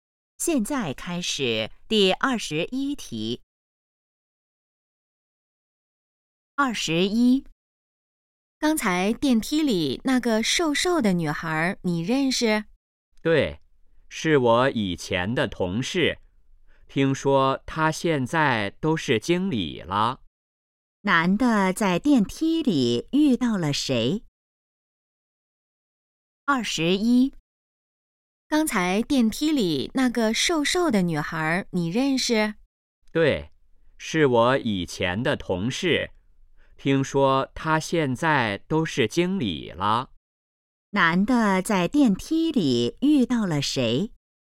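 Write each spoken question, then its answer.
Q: 男的在电梯里遇到了谁?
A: 以前的同事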